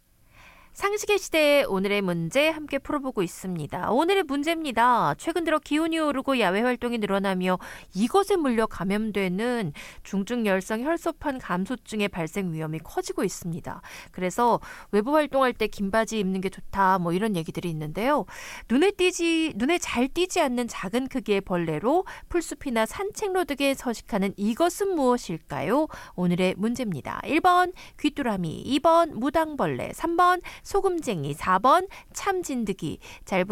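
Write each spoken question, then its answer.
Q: 눈에 잘 띄지 않는 작은 크기의 벌레로 풀숲이나 산책로 등에 서식하는 이것은 무엇일까요?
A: 4번: 참진드기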